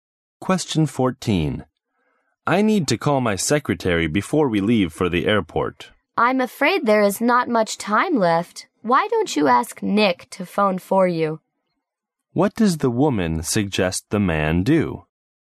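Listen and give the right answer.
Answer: Ask Nick to phone his secretary for him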